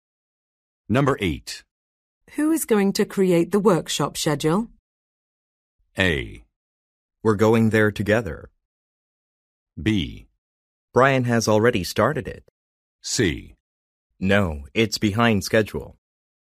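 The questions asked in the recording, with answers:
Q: Who is going to create the workshop schedule?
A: B: Brian has already started it.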